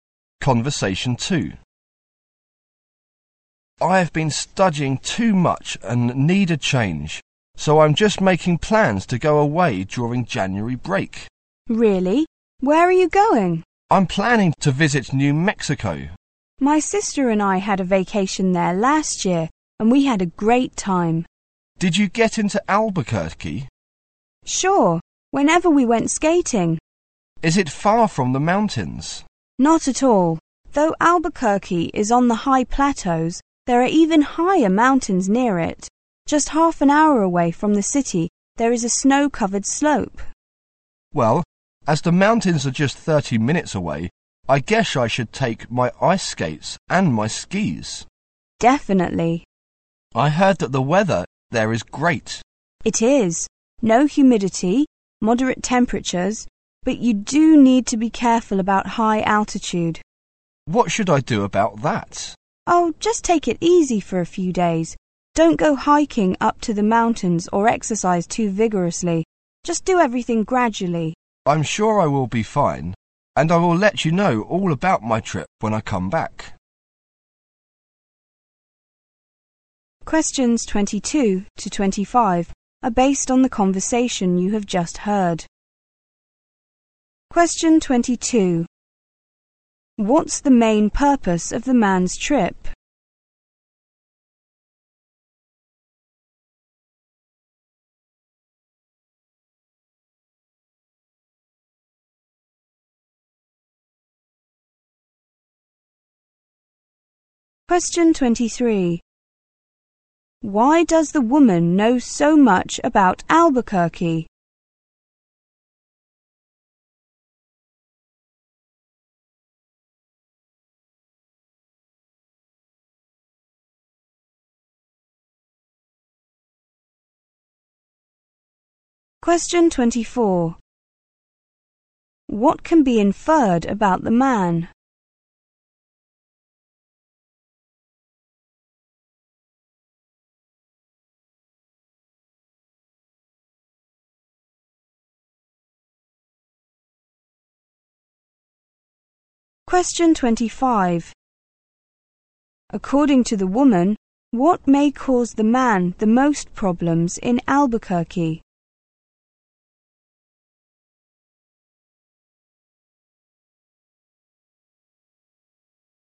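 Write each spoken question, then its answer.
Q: Why does the woman know so much about Albuquerque?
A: She went there on vacation last year.

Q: According to the woman, what may cause the man the most problems in Albuquerque?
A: The high altitude.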